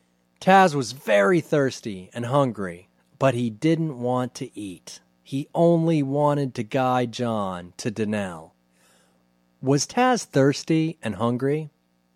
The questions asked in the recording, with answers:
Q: Was Taz thirsty and hungry?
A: Yes, he was very thirsty and hungry.